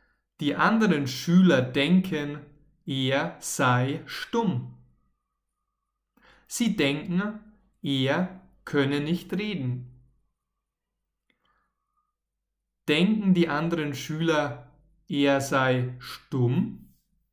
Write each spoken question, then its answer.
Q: Denken die anderen Schüler, er sei stumm?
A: Ja, genau.